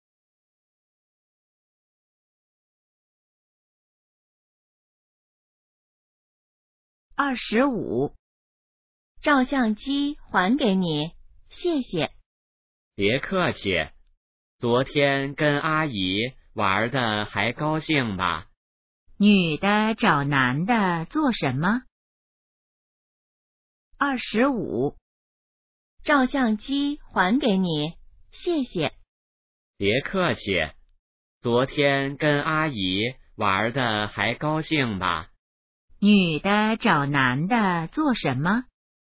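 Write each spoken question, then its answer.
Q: 女的找男的做什么?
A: 还照相机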